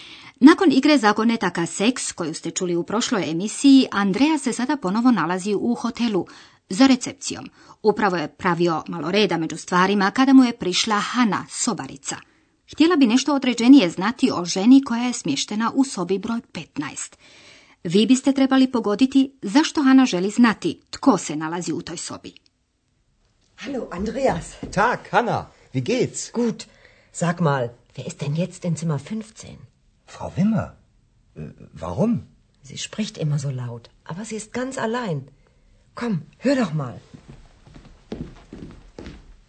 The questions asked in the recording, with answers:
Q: Vi biste trebali pogoditi zašto Hana želi znati tko se nalazi u toj sobi.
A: Hana želi znati tko je u sobi broj 15 jer je primijetila da tamo neka žena stalno tako glasno priča.